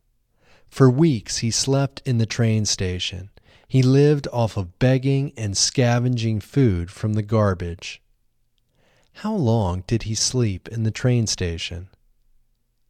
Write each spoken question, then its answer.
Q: How long did he sleep in the train station?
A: He slept in the train station for weeks.